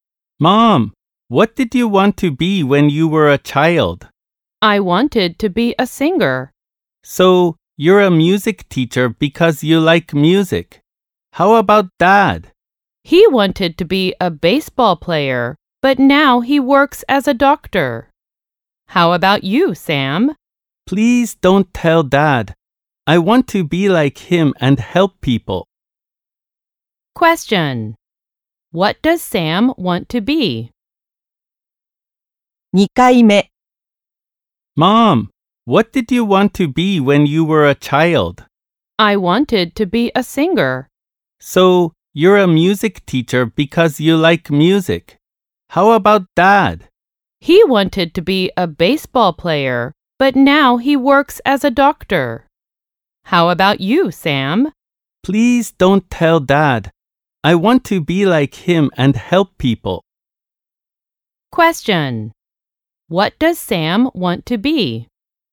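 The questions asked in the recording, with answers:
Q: What does Sam want to be?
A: A doctor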